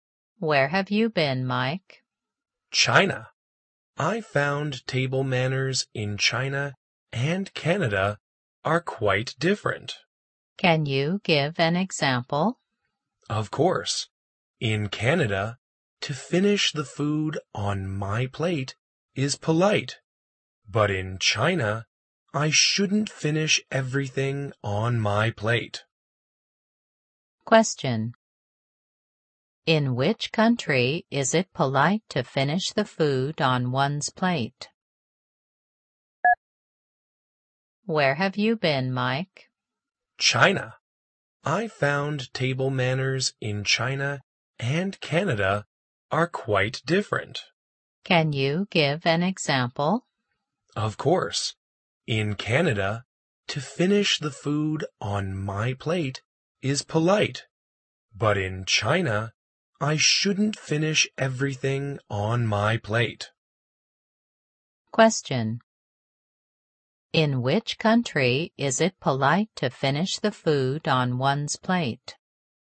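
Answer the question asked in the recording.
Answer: Canada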